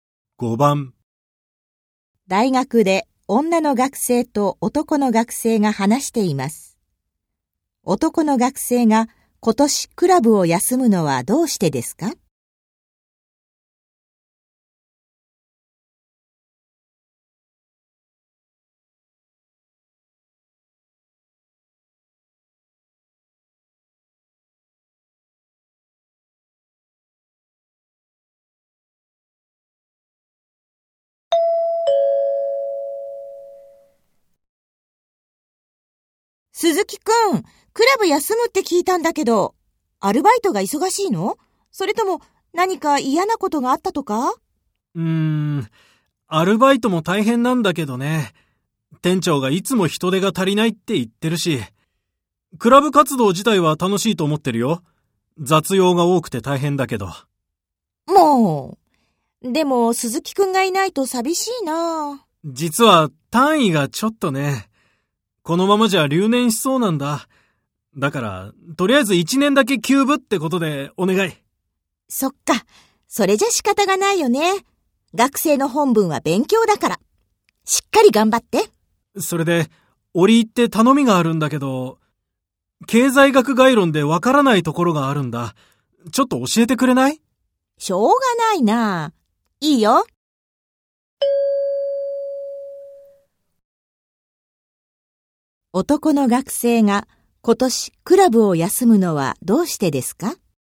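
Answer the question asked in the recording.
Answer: 単位が足りず留年しそうで、勉強しなければならないから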